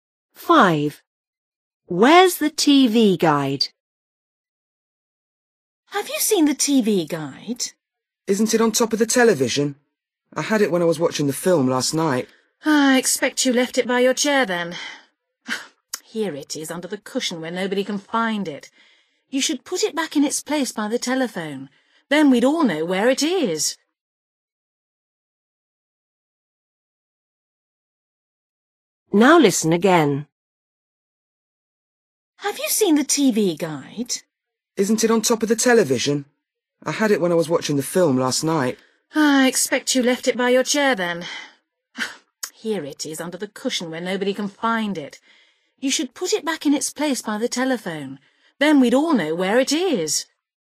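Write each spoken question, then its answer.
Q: Where's the TV guide?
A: Under the cushion on the chair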